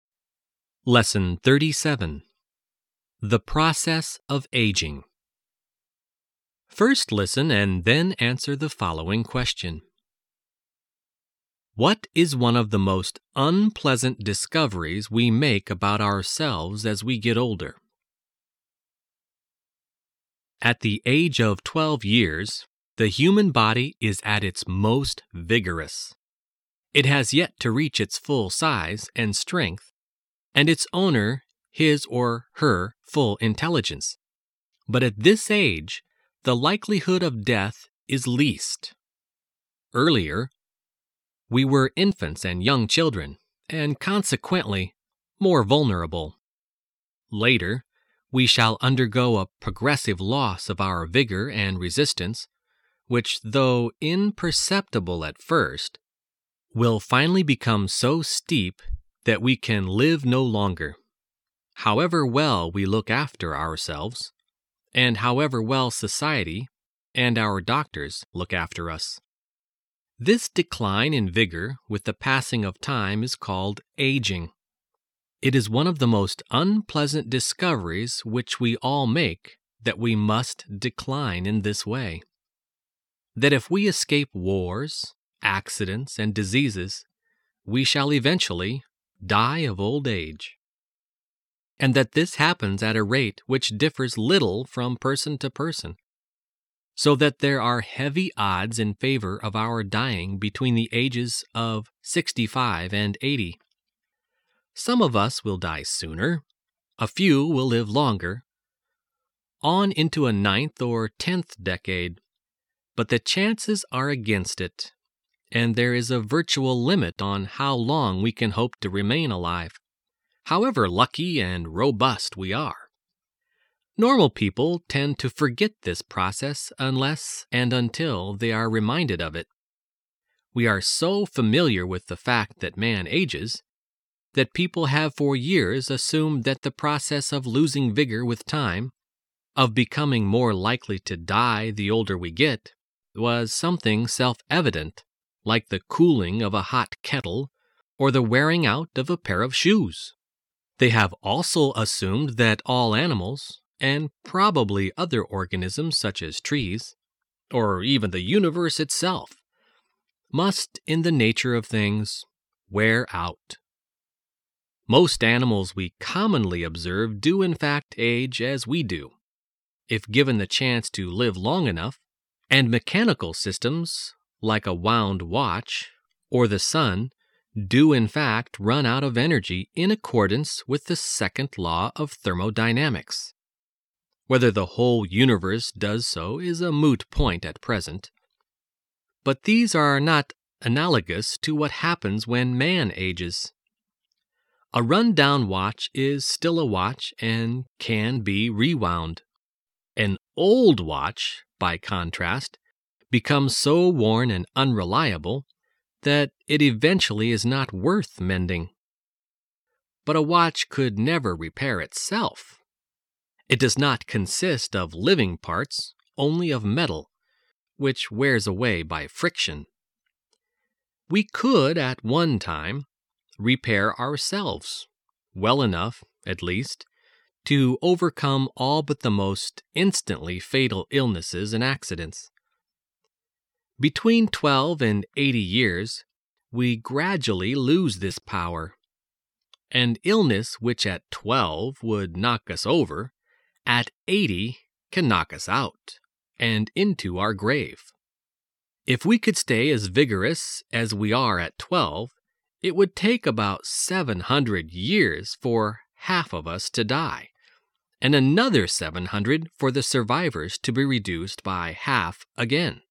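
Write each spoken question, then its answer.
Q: What is one of the most unpleasant discoveries we make about ourselves as we get older?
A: That we must decline in vigor with age and will eventually die of old age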